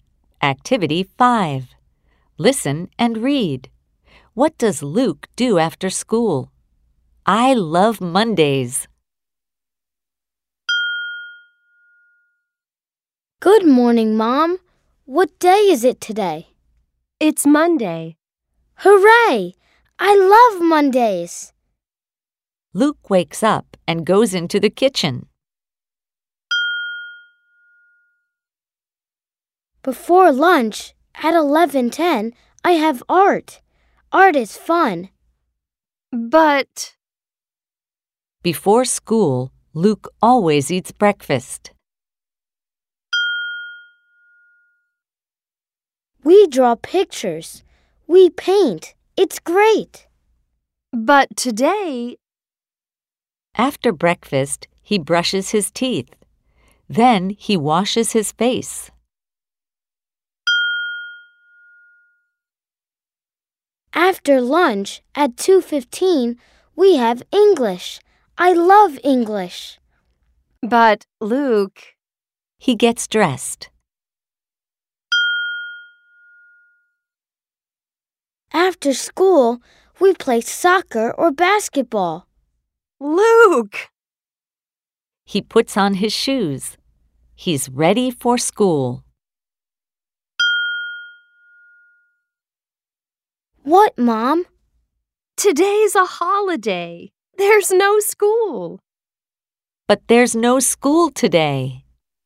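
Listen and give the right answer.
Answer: He plays soccer or basketball.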